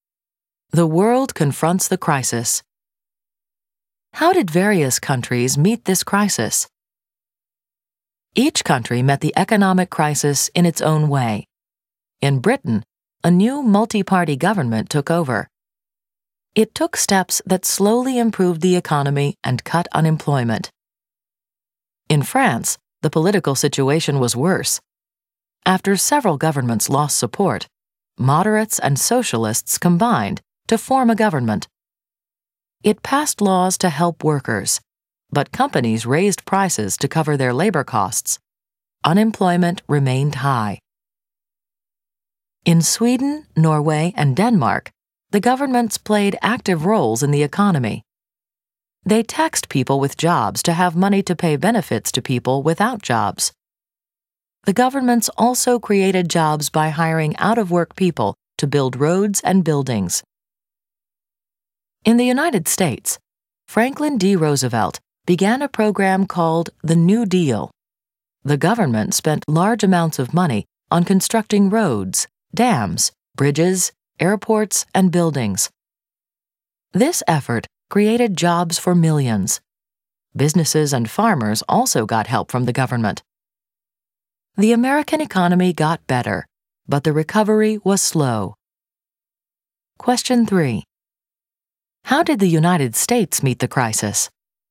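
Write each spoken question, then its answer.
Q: How did the United States meet the crisis?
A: With Roosevelt's New Deal: government spending on public works to create jobs, plus help for businesses and farmers.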